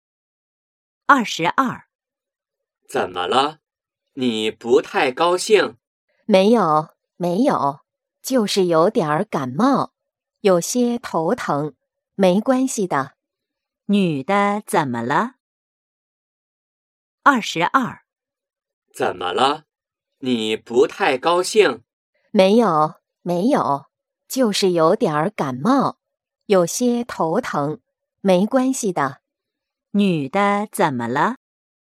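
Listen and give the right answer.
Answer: 感冒了,有些头疼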